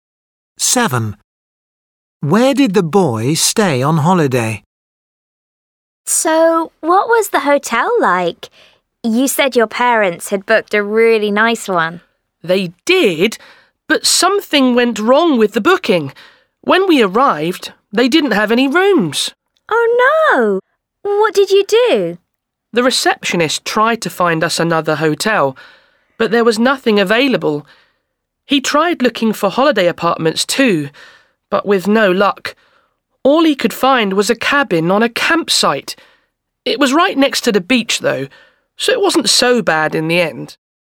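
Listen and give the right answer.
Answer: a cabin on a campsite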